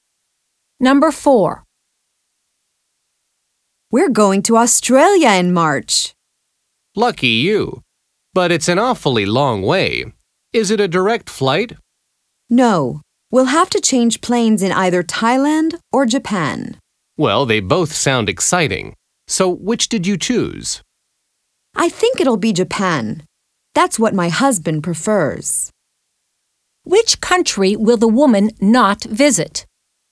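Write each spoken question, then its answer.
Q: Which country will the woman not visit?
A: Thailand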